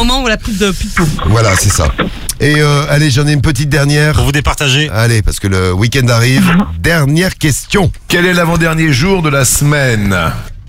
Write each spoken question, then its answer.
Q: Quel est l'avant-dernier jour de la semaine?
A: Samedi.